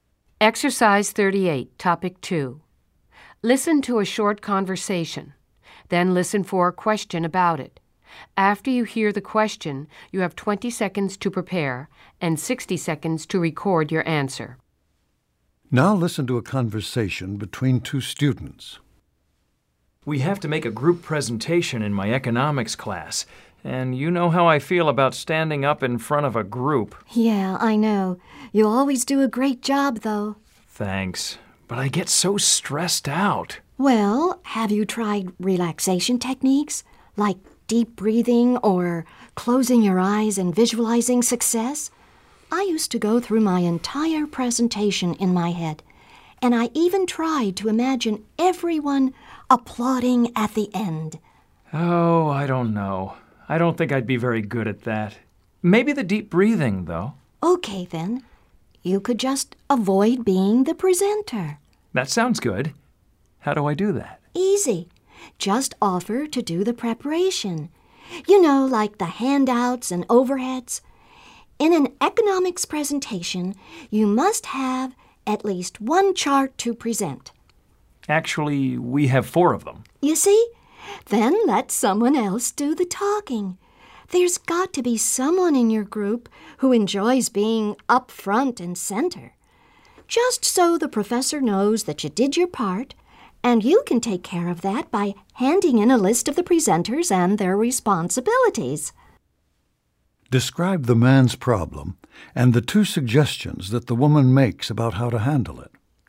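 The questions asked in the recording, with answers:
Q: Describe the man's problem and the two suggestions that the woman makes about how to handle it.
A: He fears speaking in front of a group for his economics presentation. She suggests relaxation techniques such as deep breathing and visualization, or preparing the materials while someone else presents, then handing in a list of the responsibilities.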